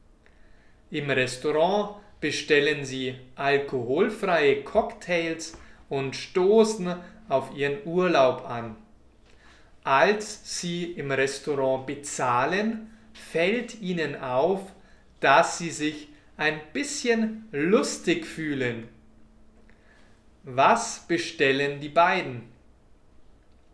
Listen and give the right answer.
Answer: Die beiden bestellen alkoholfreie Cocktails.